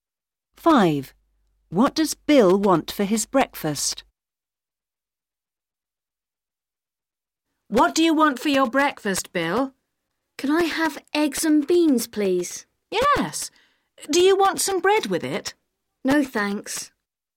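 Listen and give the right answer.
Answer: eggs and beans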